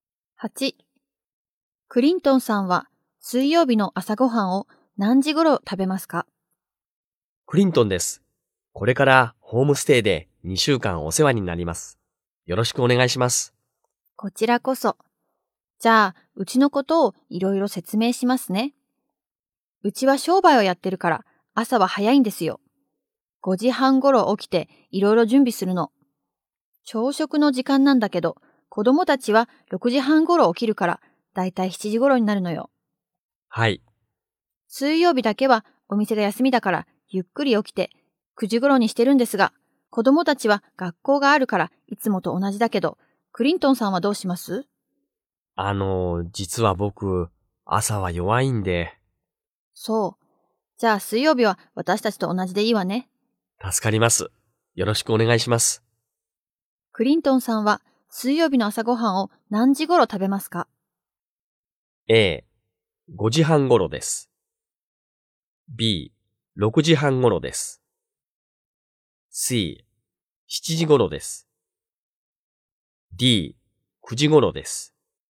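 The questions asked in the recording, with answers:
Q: クリントンさんは水曜日の朝ごはんを何時頃食べますか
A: D: 9時頃です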